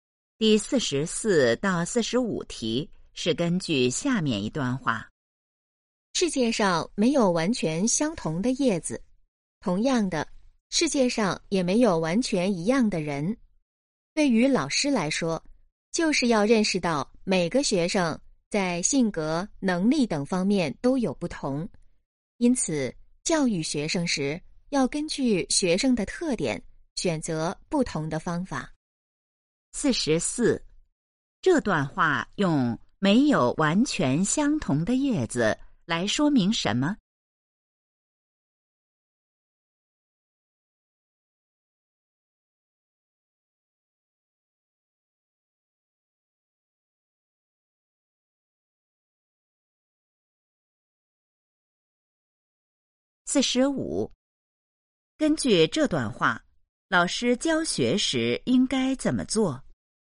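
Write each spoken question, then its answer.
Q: 这段话用没有完全相同的叶子来说明什么?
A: 每个人都不一样

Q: 根据这段话,老师教学时应该怎么做?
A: 根据学生的特点选择不同的方法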